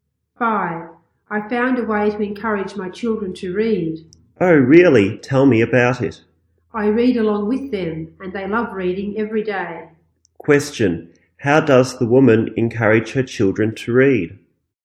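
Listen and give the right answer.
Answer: She reads along with them.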